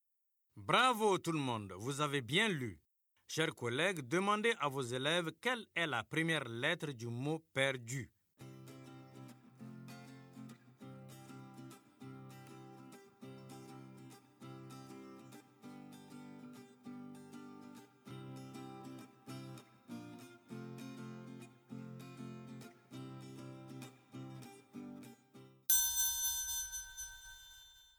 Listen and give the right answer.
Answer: C'est P.